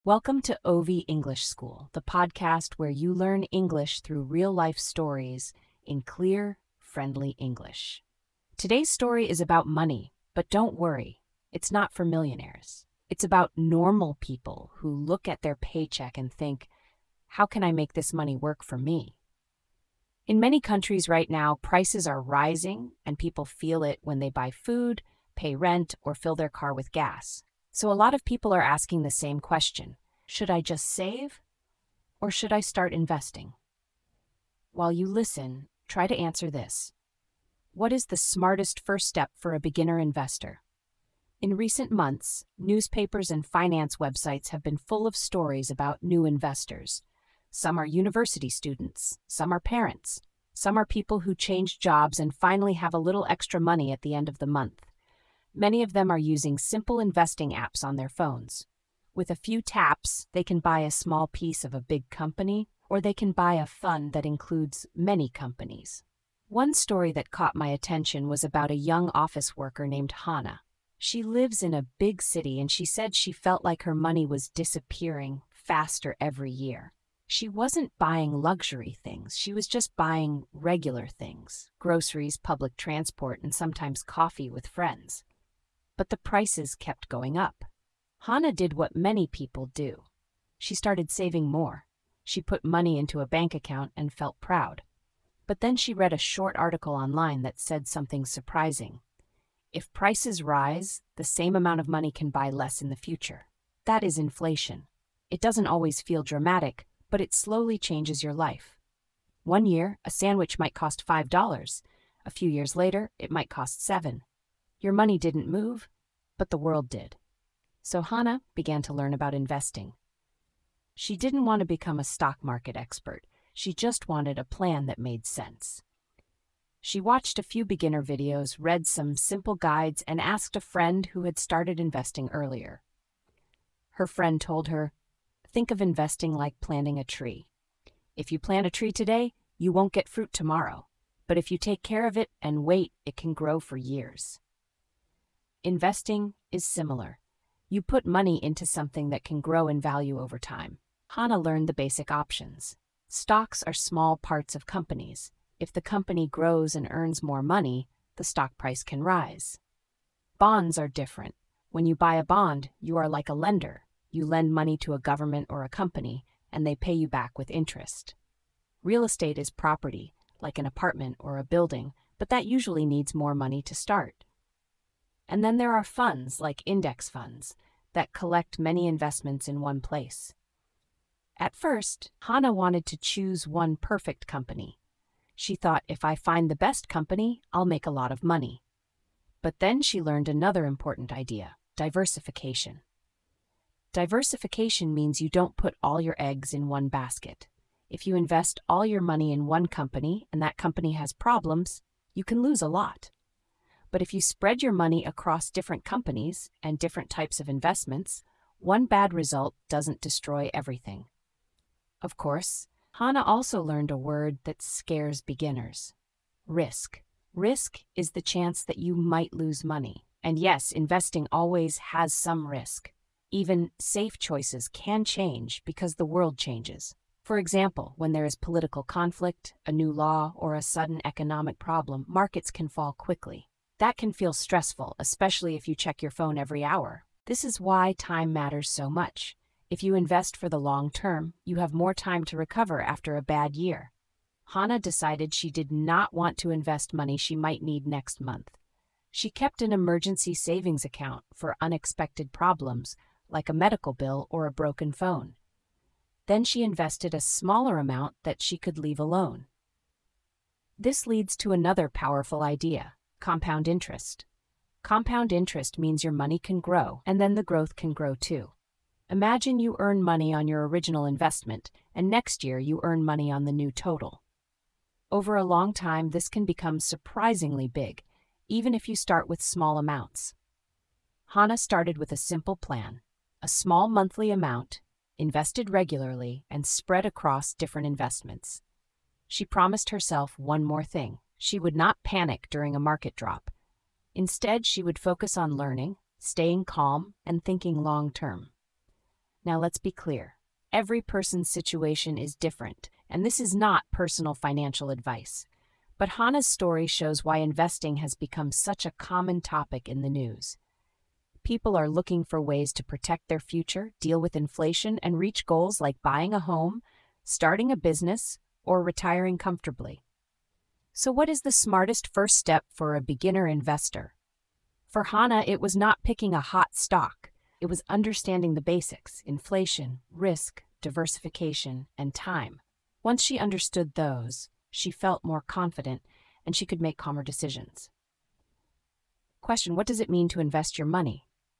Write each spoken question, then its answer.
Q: Question: what does it mean to invest your money?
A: it means you put money into something that can grow in value over time.